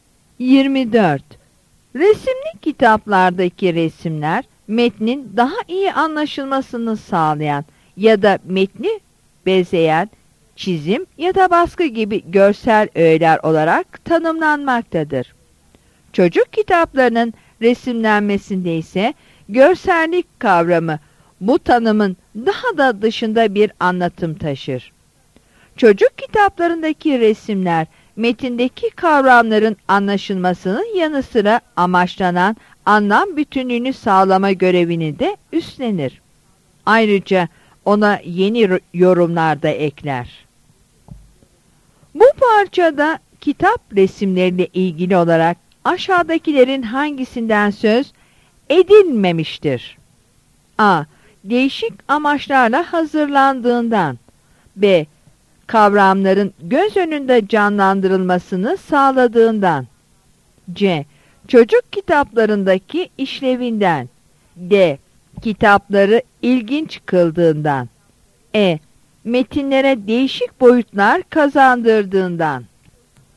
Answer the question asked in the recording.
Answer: Yanıt D'dir.